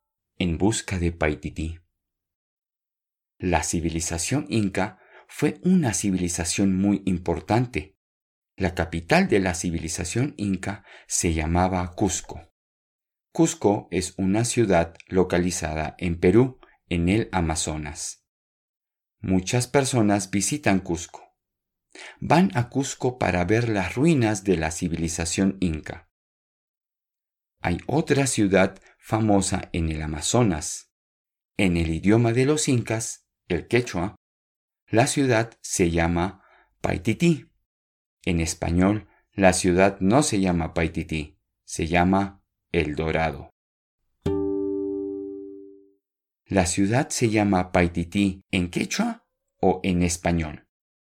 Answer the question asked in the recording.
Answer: Sí, en quechua.